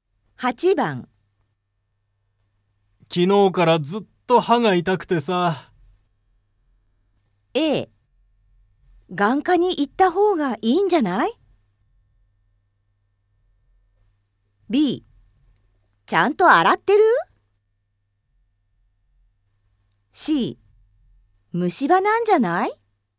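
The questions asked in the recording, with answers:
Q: 昨日からずっと歯が痛くてさ。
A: C: 虫歯なんじゃない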